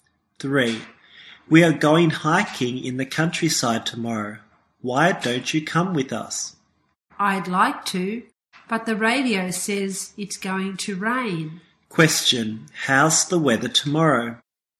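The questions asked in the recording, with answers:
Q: How's the weather tomorrow?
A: It's going to rain.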